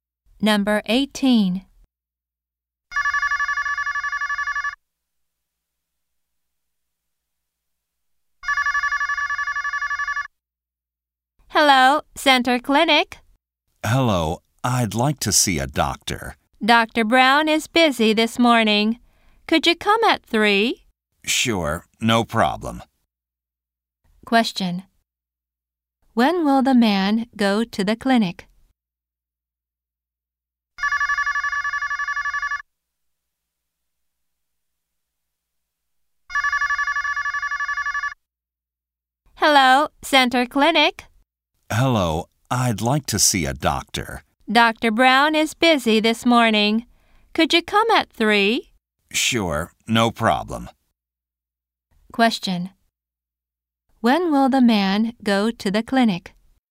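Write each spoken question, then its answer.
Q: When will the man go to the clinic?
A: At 3.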